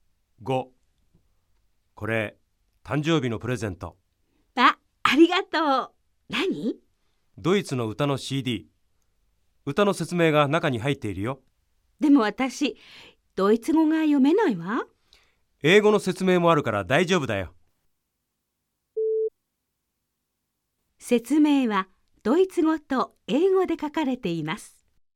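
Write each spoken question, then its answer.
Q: 説明はドイツ語と英語で書かれています。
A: 正しい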